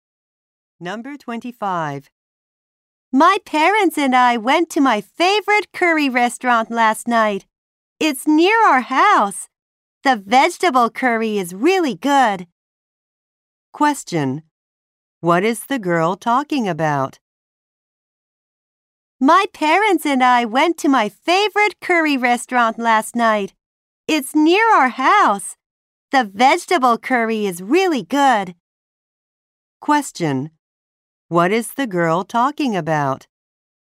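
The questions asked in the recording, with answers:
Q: What is the girl talking about?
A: Her favorite curry restaurant.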